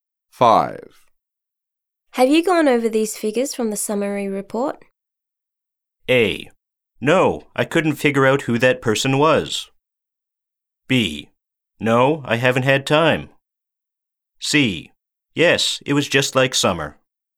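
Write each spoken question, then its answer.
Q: Have you gone over these figures from the summary report?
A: B: No, I haven't had time.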